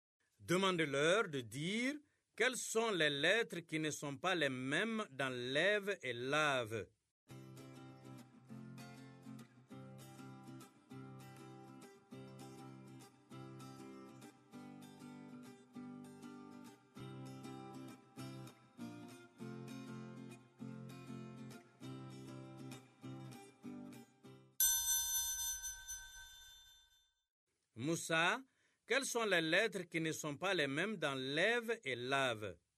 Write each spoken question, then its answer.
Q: Moussa, quelles sont les lettres qui ne sont pas les mêmes dans lève et lave?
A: E. E accent grave. Dans lève. Et A dans lave.